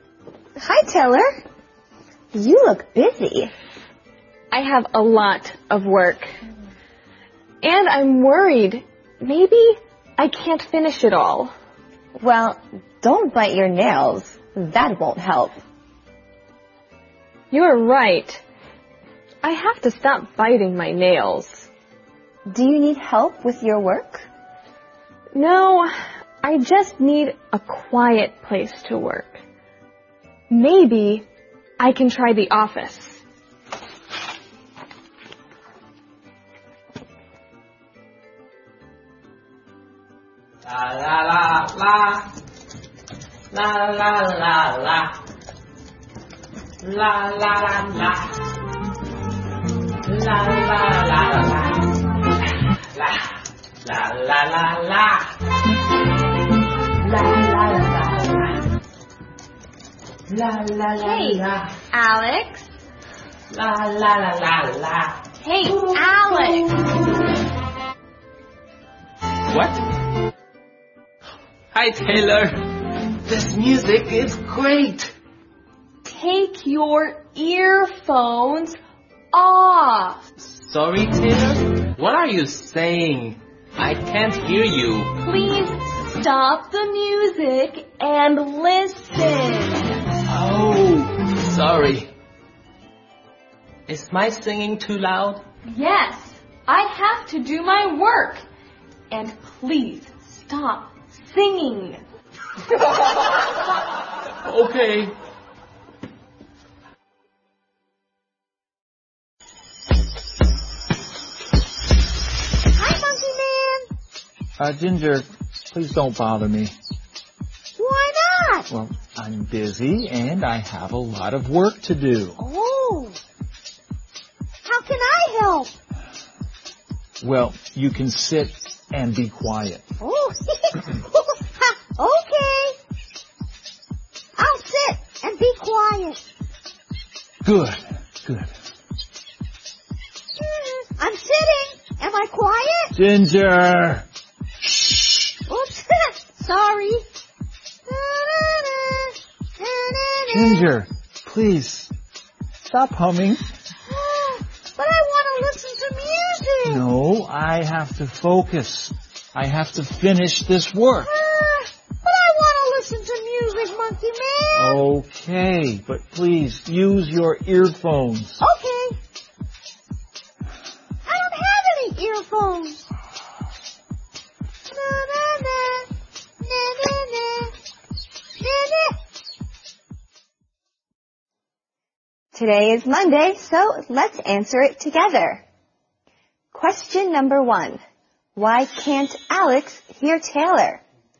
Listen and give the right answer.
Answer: He is singing with earphones on.